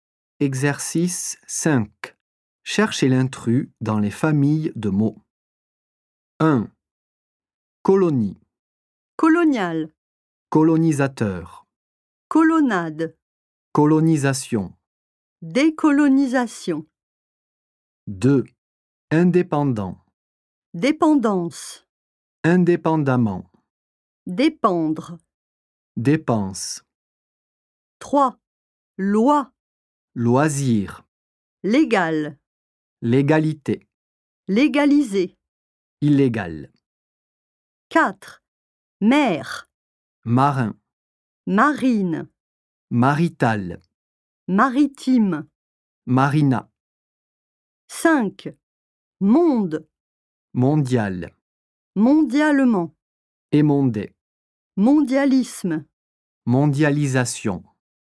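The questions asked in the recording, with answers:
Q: Colonie. Colonial. Colonisateur. Colonnade. Colonisation. Décolonisation.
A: Colonnade

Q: Indépendant. Dépendance. Indépendamment. Dépendre. Dépense.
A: Dépense

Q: Loi. Loisir. Légal. Légalité. Légaliser. Illégal.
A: Loisir

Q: Mer. Marin. Marine. Marital. Maritime. Marina.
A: Marital

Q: Monde. Mondial. Mondialement. Émondé. Mondialisme. Mondialisation.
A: Émondé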